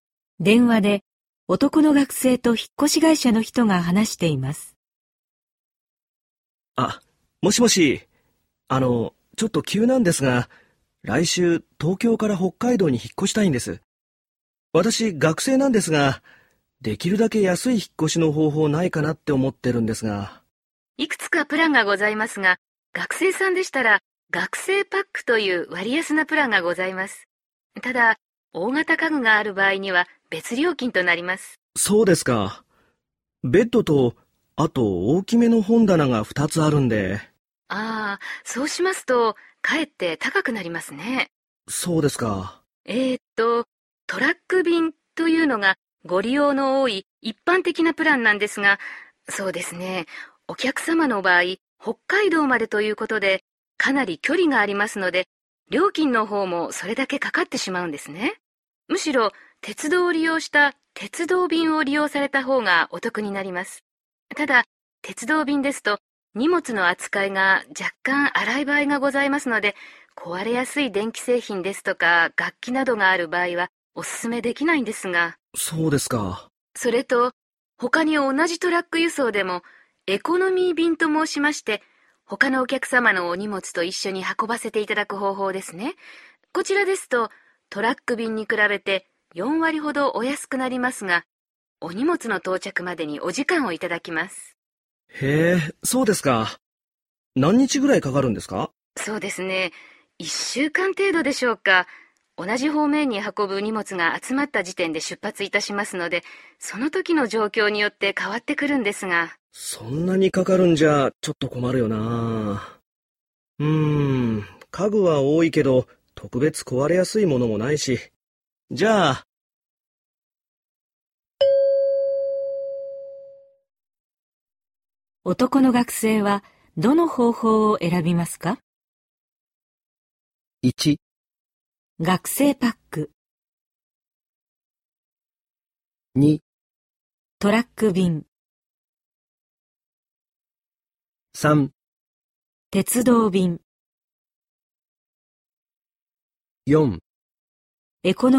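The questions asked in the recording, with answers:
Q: 男の学生はどの方法を選びますか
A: 3: 鉄道便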